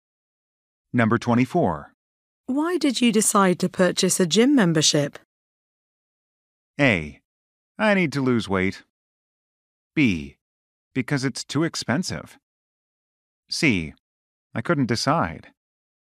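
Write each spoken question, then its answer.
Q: Why did you decide to purchase a gym membership?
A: A: I need to lose weight.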